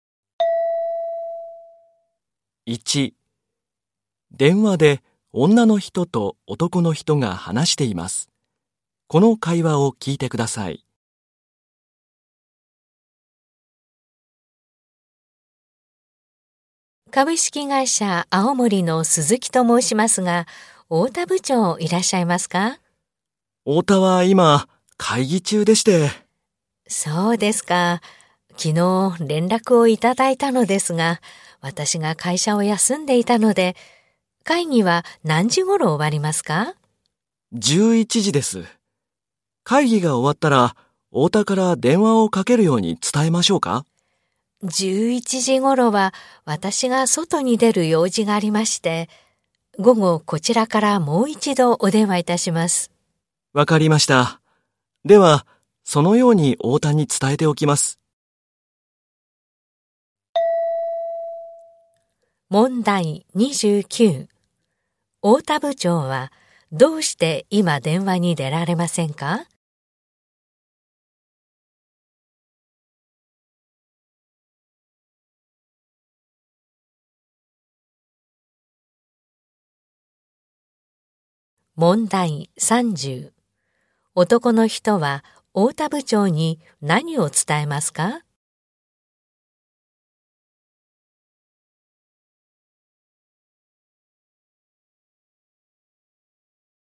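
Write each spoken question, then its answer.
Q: 太田部長はどうして今電話に出られませんか?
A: 会議中だから

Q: 男の人は太田部長に何を伝えますか?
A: 午後女の人がもう一度電話すること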